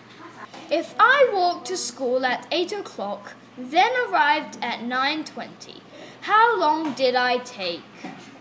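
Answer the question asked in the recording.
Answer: 1 hour 20 minutes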